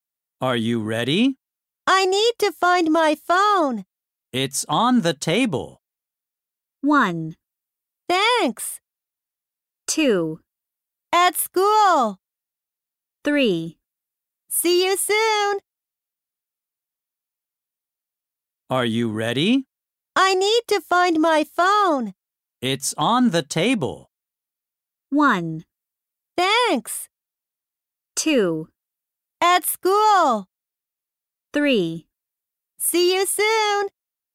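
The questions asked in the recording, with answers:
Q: It's on the table.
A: 1: Thanks.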